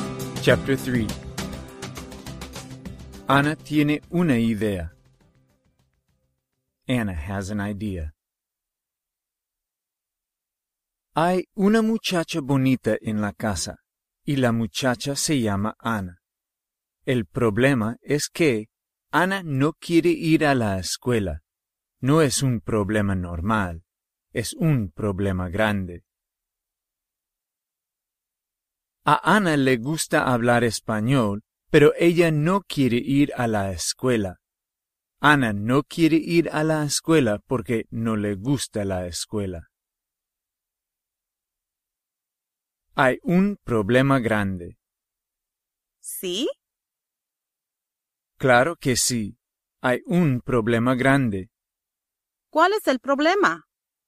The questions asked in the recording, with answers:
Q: ¿Cuál es el problema?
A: Anna quiere hablar español, pero ella no quiere ir a la escuela.